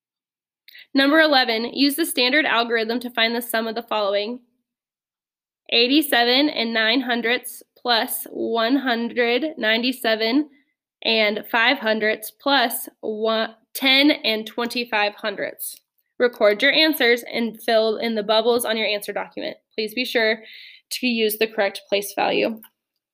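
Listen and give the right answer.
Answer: 294.39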